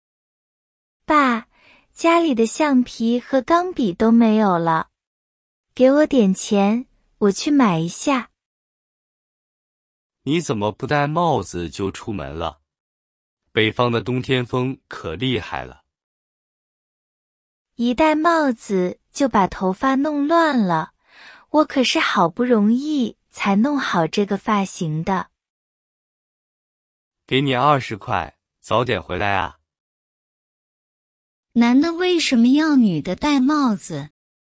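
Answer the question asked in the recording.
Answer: 北方的冬天风很大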